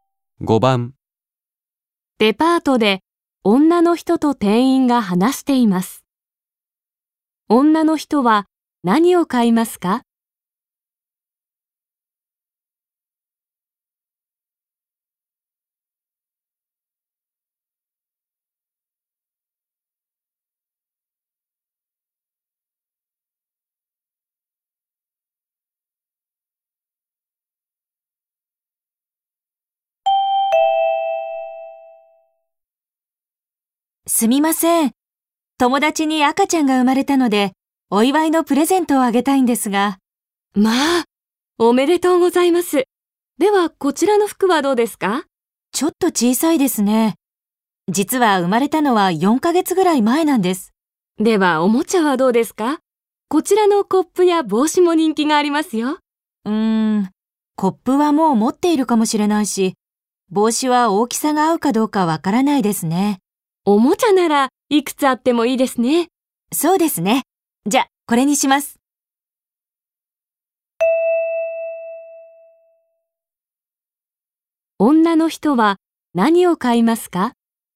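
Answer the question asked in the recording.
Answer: おもちゃ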